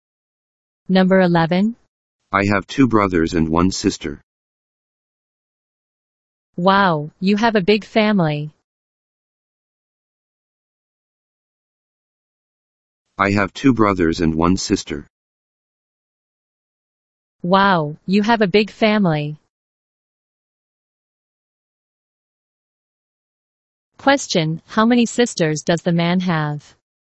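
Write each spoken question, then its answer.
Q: Question, how many sisters does the man have?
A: One.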